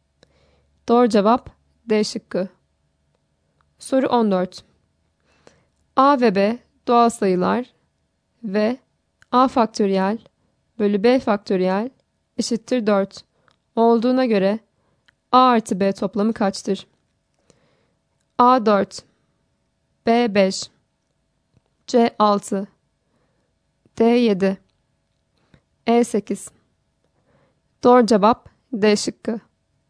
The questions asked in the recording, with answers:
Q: A ve B doğal sayılar ve A faktöriyel bölü B faktöriyel eşittir 4 olduğuna göre A artı B toplamı kaçtır?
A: Doğru cevap D şıkkı.